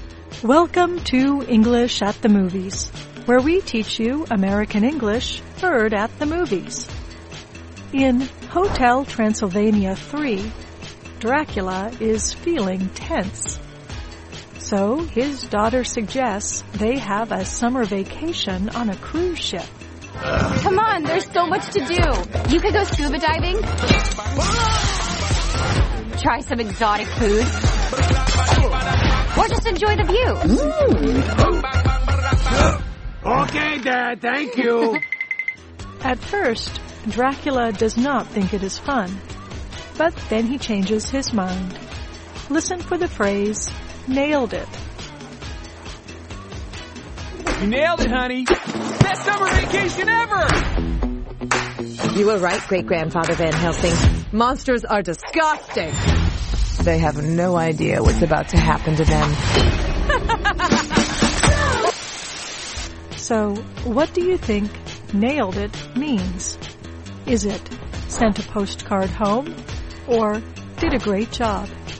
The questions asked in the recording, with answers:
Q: So, what do you think nailed it means? Is it sent a postcard home or did a great job?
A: Nailed it means did a great job.